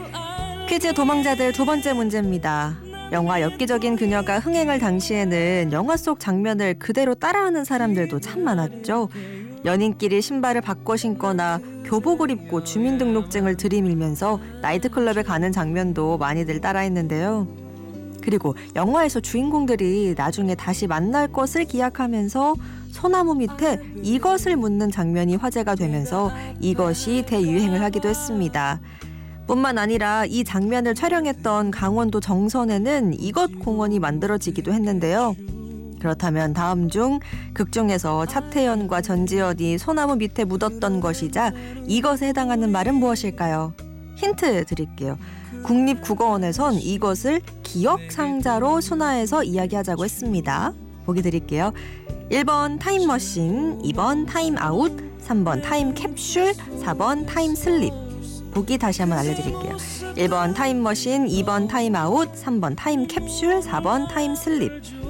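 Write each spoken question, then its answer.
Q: 그렇다면 다음 중 극중에서 차태현과 전지현이 소나무 밑에 묻었던 것이자 이것에 해당하는 말은 무엇일까요?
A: 3번: 타임캡슐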